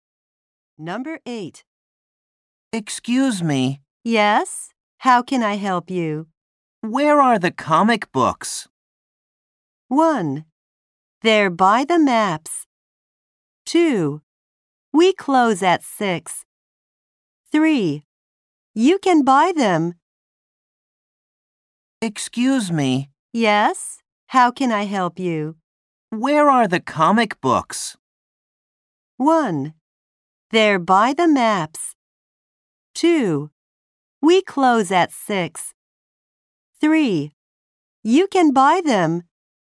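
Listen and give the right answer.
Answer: 1: They're by the maps.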